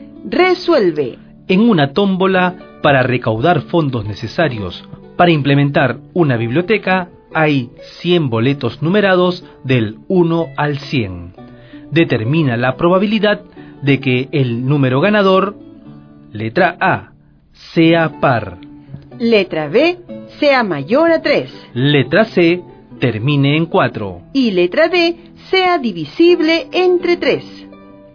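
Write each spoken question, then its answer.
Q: Letra B, sea mayor a 3.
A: 97/100

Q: Letra C, termine en 4.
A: 10/100 = 1/10

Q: Y letra D, sea divisible entre 3.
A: 33/100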